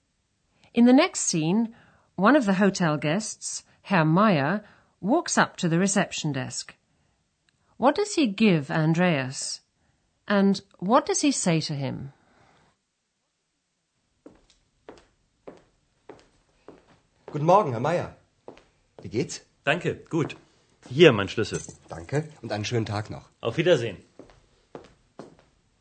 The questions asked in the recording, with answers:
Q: What does he give Andreas?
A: Herr Meyer puts his key on the counter

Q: And what does he say to him?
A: says to Andreas, Here's my key.